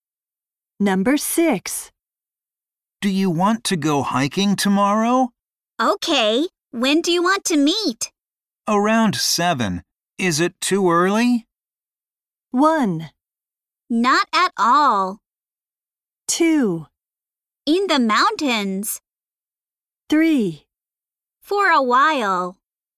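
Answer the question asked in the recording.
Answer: 1: Not at all.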